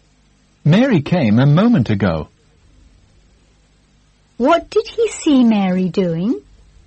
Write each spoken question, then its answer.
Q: What did he see Mary doing?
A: He saw Mary coming a moment ago.